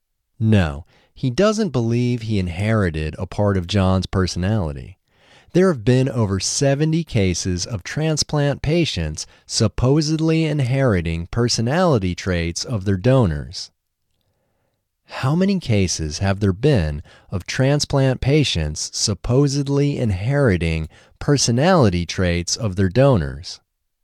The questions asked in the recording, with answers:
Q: How many cases have there been of transplant patients supposedly inheriting personality traits of their donors?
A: There have been over 70 cases of transplant patients supposedly inheriting personality traits of their donors.